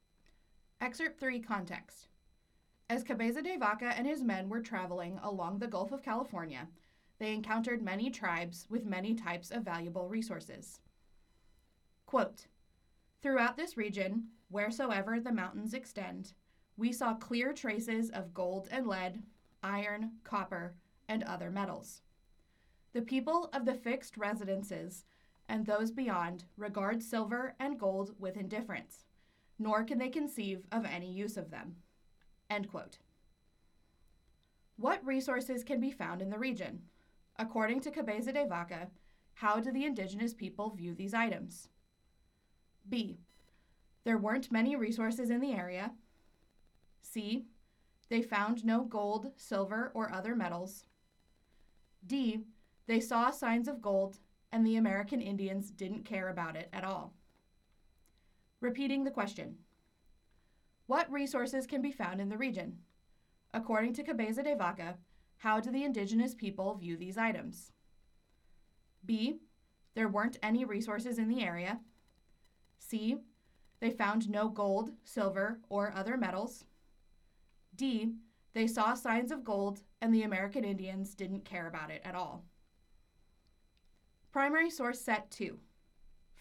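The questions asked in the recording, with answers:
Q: What resources can be found in the region?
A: D: They saw signs of gold, and the American Indians didn't care about it at all.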